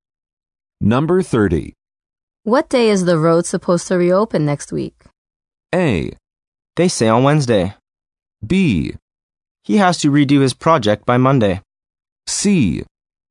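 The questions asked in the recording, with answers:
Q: What day is the road supposed to reopen next week?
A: A: They say on Wednesday.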